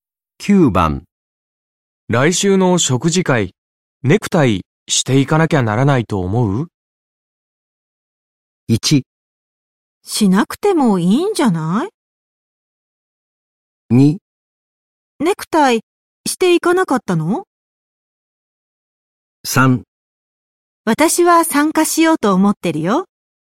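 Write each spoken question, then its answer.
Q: 来週の食事会、ネクタイしていかなきゃならないと思う?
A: 1: しなくてもいいんじゃない?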